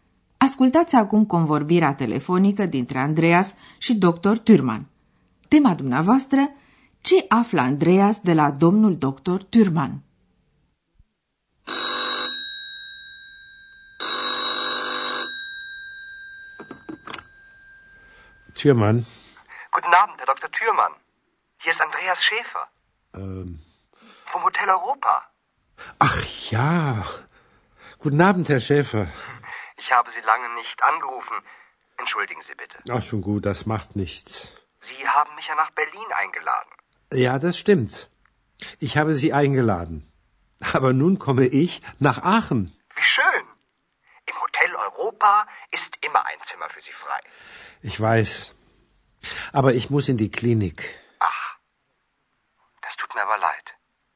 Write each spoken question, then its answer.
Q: Tema dumneavoastră, ce află Andreas de la domnul doctor Thürmann?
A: Andreas află două lucruri. În primul rând că Thürmann vine la Aachen. În al doilea rând că trebuie să se interneze într-o clinică.